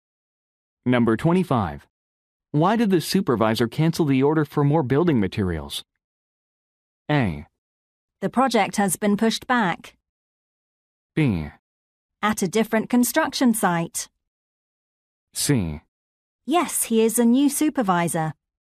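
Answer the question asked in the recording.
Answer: A: The project has been pushed back.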